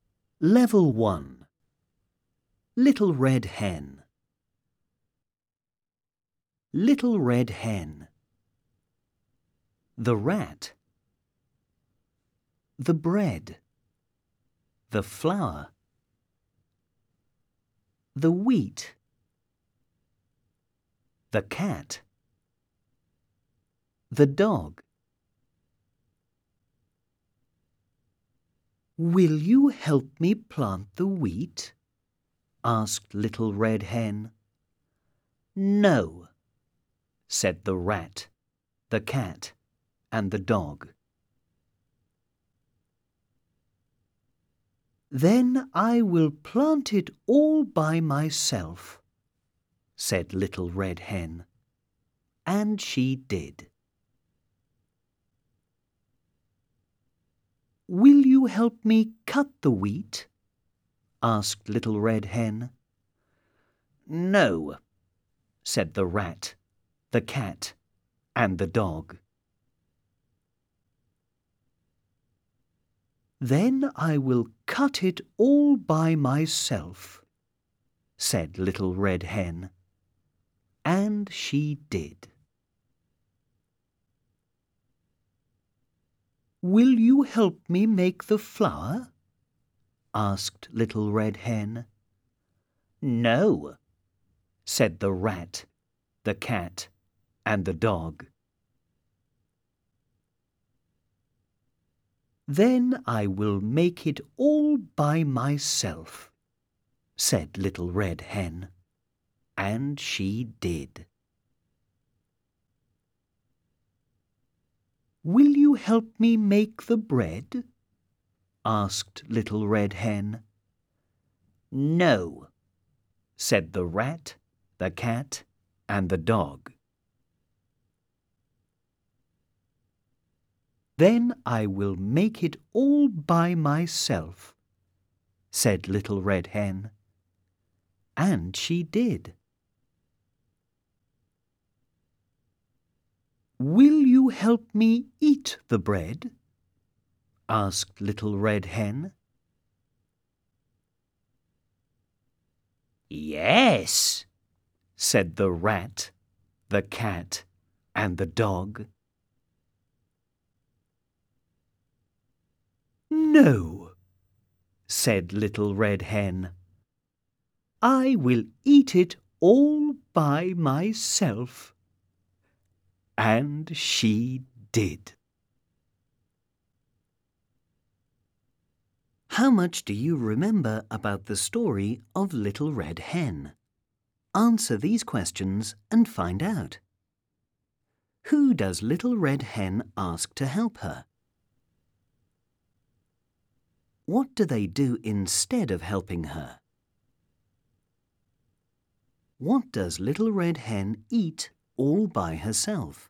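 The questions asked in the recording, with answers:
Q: Who does Little Red Hen ask to help her?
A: The Rat, the Cat, and the Dog

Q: What does Little Red Hen eat all by herself?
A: The bread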